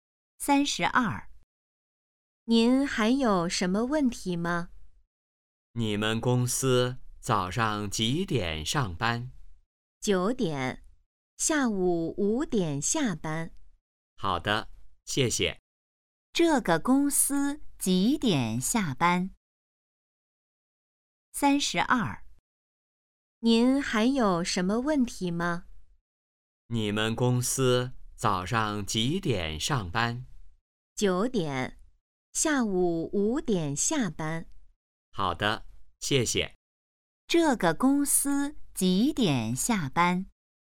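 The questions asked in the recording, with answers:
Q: 这个公司几点下班?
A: 下午5点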